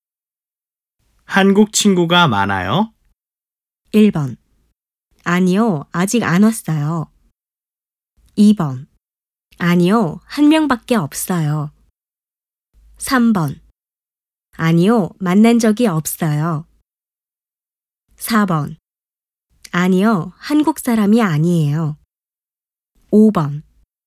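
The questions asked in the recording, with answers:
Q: 한국 친구가 많아요?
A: 2: 아니요, 한 명밖에 없어요.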